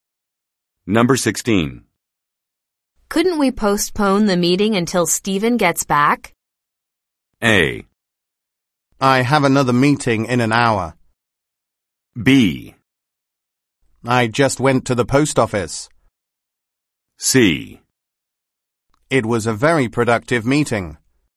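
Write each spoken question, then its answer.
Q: Couldn't we postpone the meeting until Stephen gets back?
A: A: I have another meeting in an hour.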